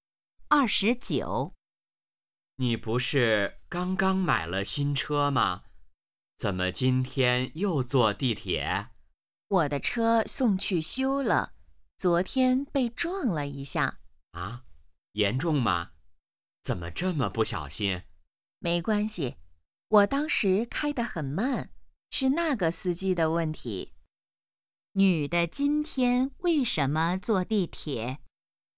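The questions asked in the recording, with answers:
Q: 女的今天为什么坐地铁?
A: 她的车送去修了(昨天被撞了)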